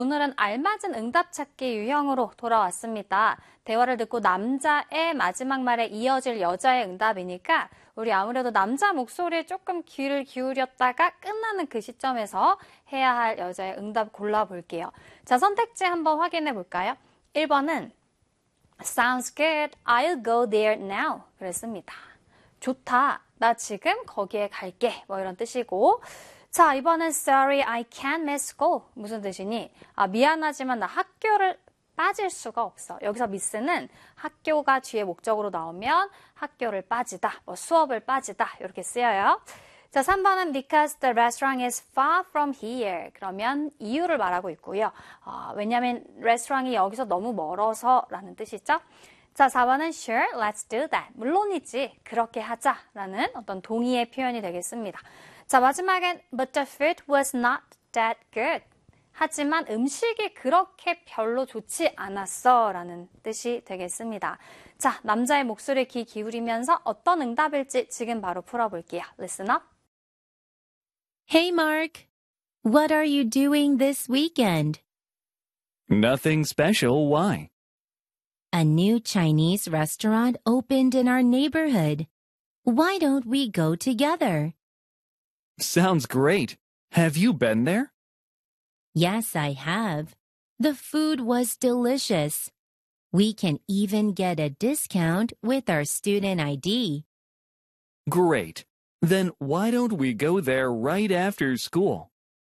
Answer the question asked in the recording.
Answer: 4번 가볼까요? Sure, let's do that.